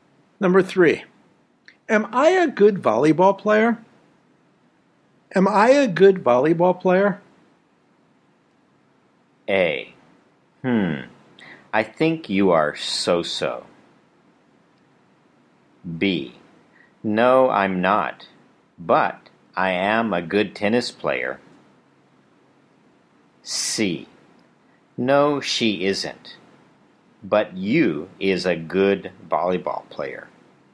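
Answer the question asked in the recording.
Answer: A: I think you are so-so.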